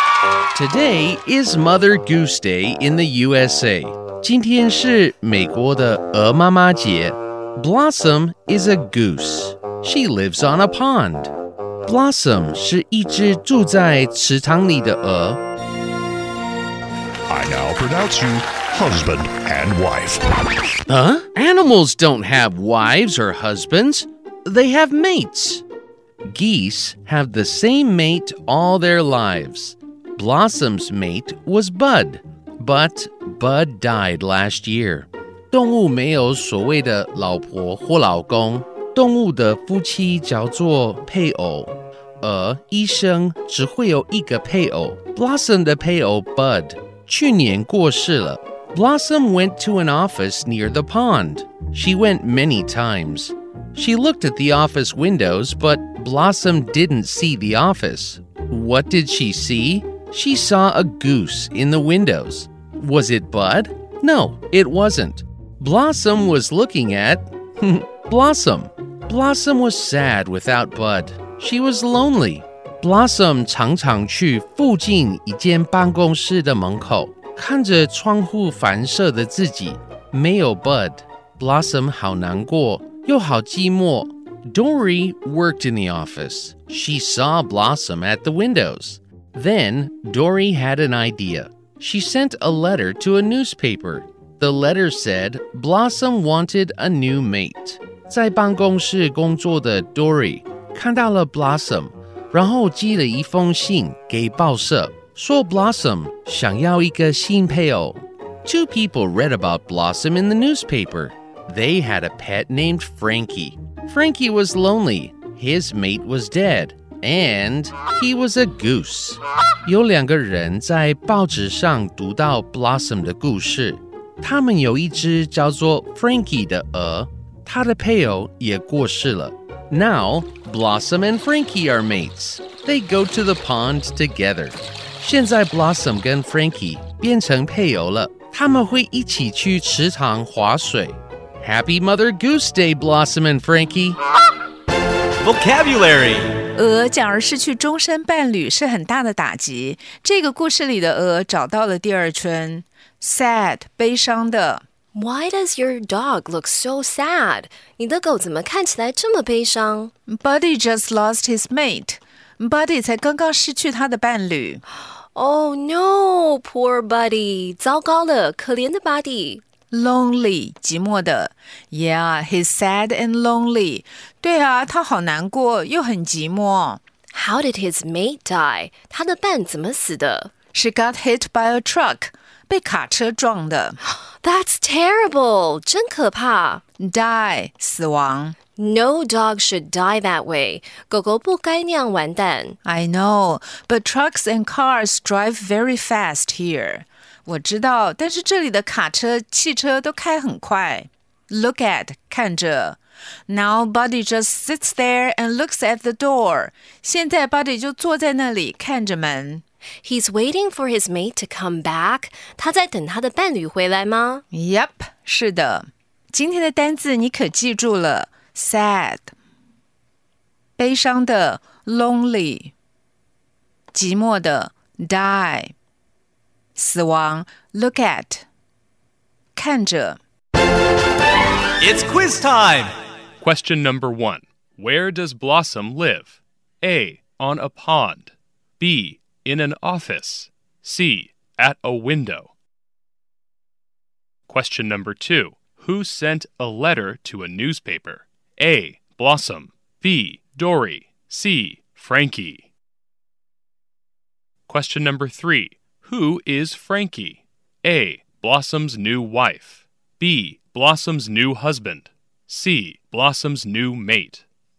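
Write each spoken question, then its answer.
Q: Where does Blossom live?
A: A: On a pond.

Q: Who sent a letter to a newspaper?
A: B: Dorie.

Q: Who is Frankie?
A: C: Blossom's new mate.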